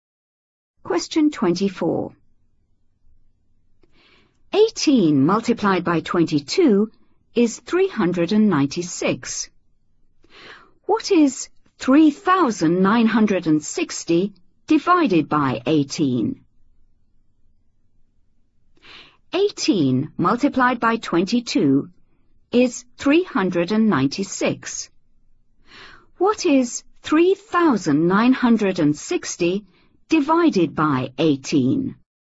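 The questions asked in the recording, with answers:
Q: What is 3,960 divided by 18?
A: 220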